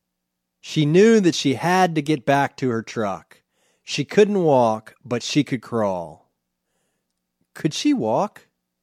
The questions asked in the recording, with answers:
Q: Could she walk?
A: No, she couldn't walk.